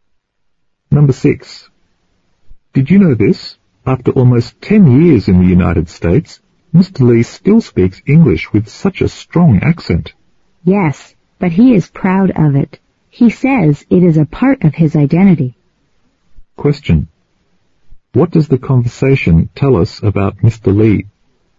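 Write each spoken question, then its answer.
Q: What does the conversation tell us about Mr. Lee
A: He still has a strong accent after almost 10 years in the US, and he is proud of it as part of his identity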